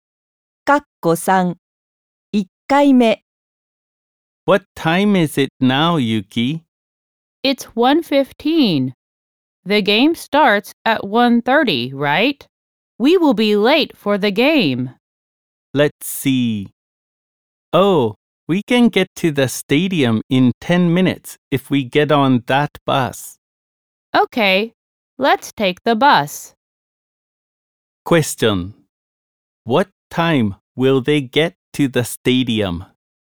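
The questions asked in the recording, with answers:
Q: What time will they get to the stadium?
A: At 1:25.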